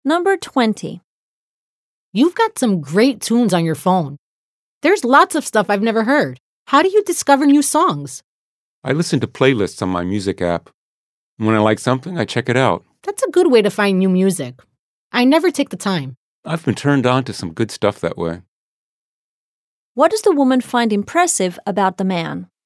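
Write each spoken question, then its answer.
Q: What does the woman find impressive about the man?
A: The great songs (music) on his phone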